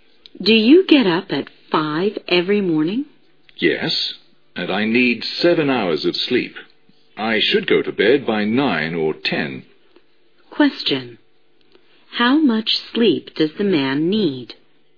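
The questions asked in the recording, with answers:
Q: How much sleep does the man need?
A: 7 hours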